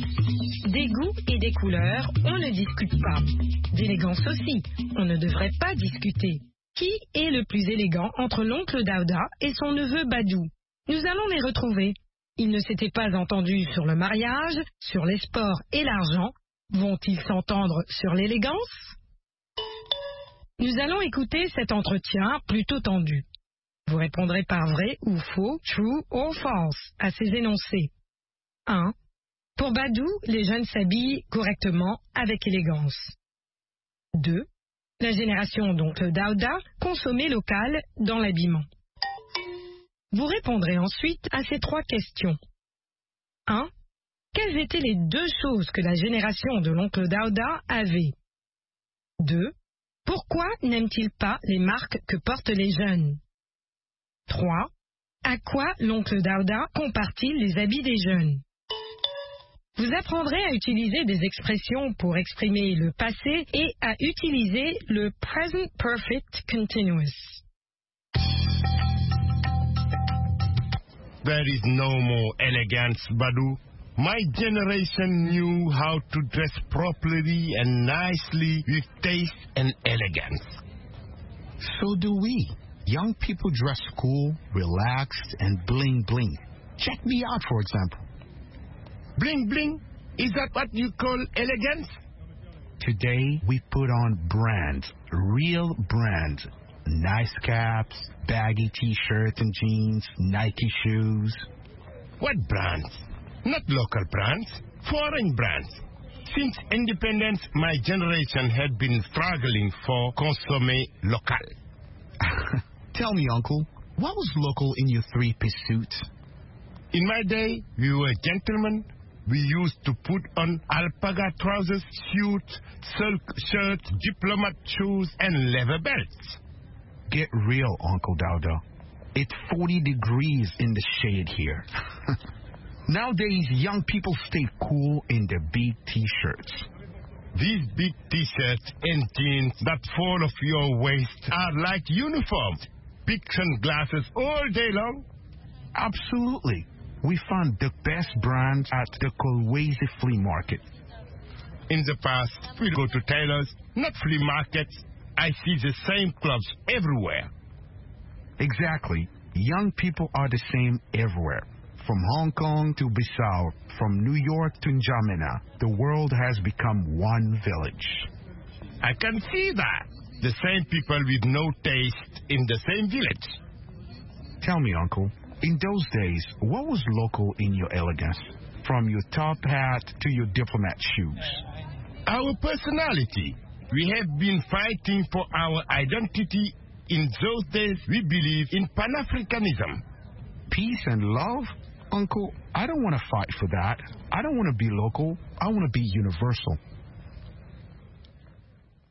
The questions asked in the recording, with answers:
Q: Pour Badou, les jeunes s'habillent correctement avec élégance.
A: L'énoncé 1 est vrai.

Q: La génération d'oncle Daouda consommait local dans l'habillement.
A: L'énoncé 2 est faux.

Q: Quelles étaient les deux choses que la génération de l'oncle Daouda avait?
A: Le goût et l'élégance.

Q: Pourquoi n'aime-t-il pas les marques que portent les jeunes?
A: Parce qu'elles sont étrangères.

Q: À quoi l'oncle Daouda compare-t-il les habits des jeunes?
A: À des uniformes.